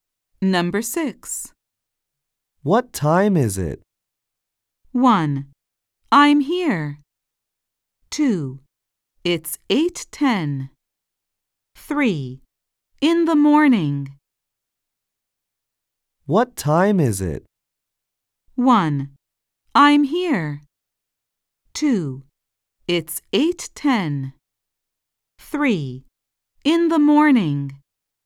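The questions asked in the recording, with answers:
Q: What time is it?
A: 2: It's 8:10.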